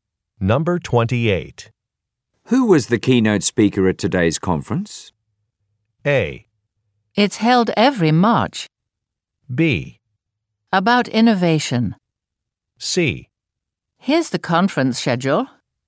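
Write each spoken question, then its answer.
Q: Who was the keynote speaker at today's conference?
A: C: Here's the conference schedule.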